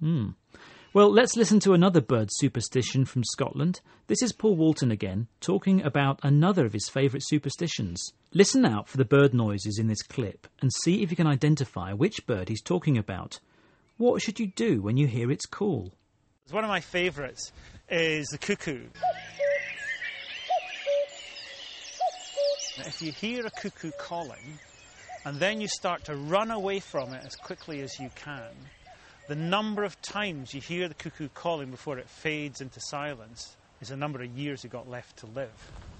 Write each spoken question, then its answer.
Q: What should you do when you hear its call?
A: But in Scotland, if you hear the cuckoo calling, then you should run away from it as quickly as you can.